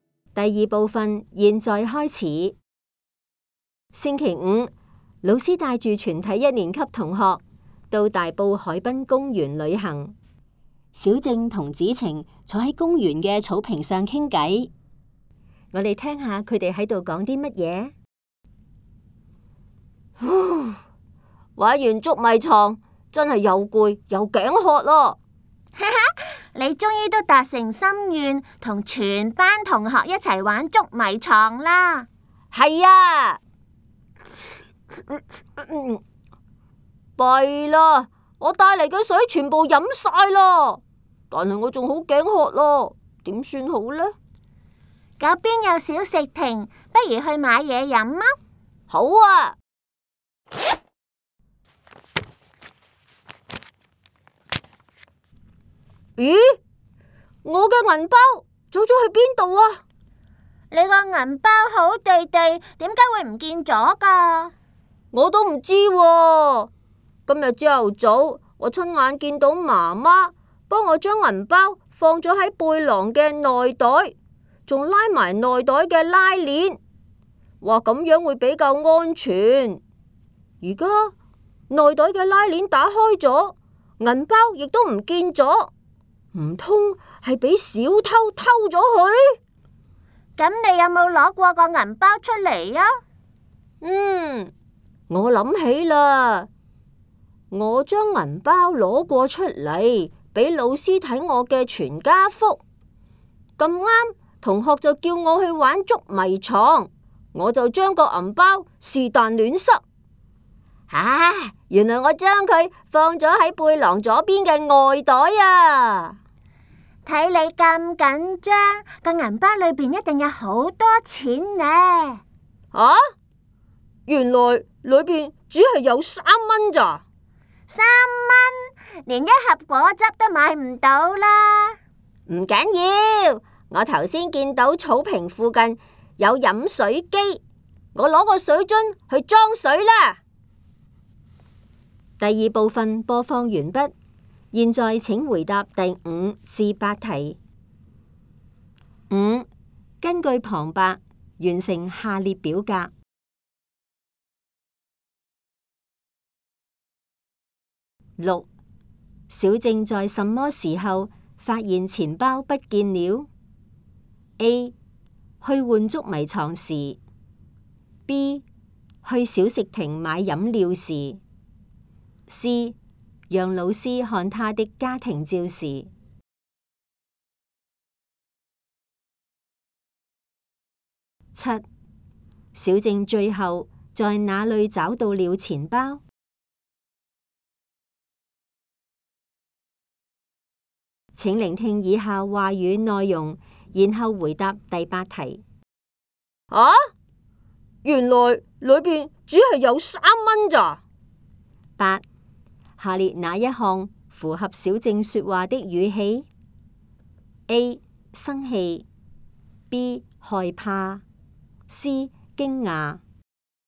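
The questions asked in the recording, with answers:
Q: 小正在什么时候发现钱包不见了? A 去换捉迷藏时, B 去小食亭买饮料时, C 让老师看他的家庭照时。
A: B: 去小食亭买饮料时

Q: 小正最后在哪里找到了钱包?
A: 背囊左边的外袋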